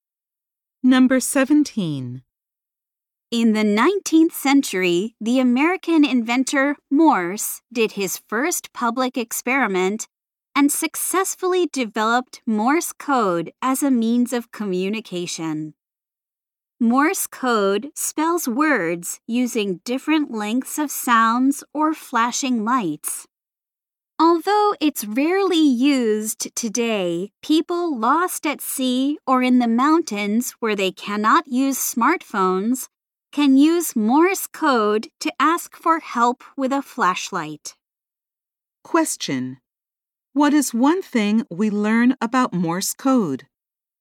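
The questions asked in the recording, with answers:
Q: What is one thing we learn about Morse code?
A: It can be used with a flashlight to ask for help by people lost at sea or in the mountains.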